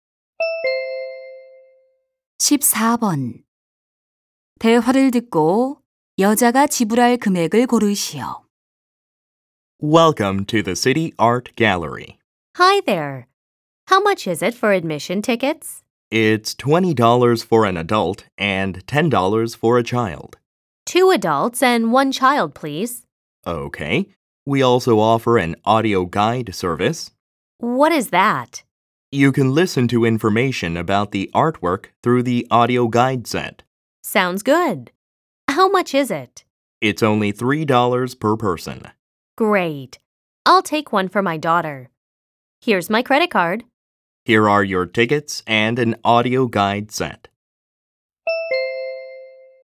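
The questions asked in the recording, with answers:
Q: 대화를 듣고 여자가 지불할 금액을 고르시오.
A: $53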